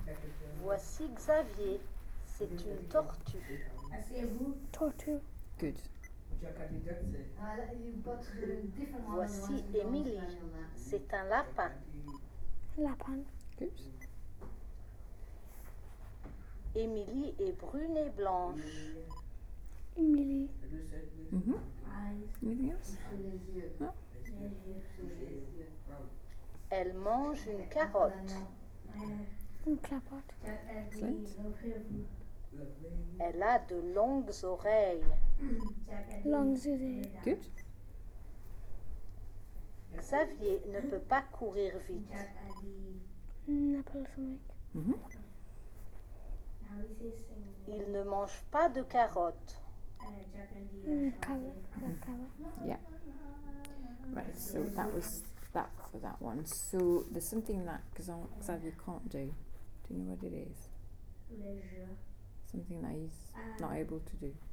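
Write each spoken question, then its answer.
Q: Do you know what it is? Something that he's not able to do.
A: Run fast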